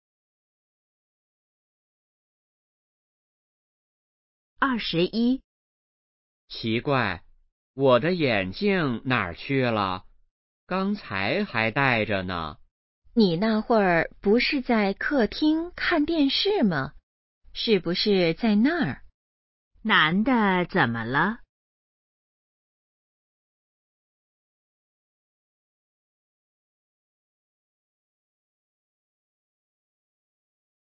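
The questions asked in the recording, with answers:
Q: 男的怎么了?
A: 找不到眼镜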